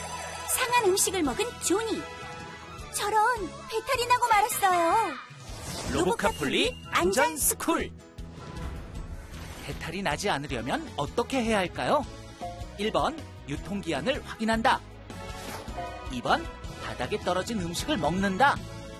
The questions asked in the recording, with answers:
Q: 배탈이 나지 않으려면 어떻게 해야 할까요?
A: 정답은 1번. 음식을 먹기 전에는 유통기한을 꼭 확인해야 해요.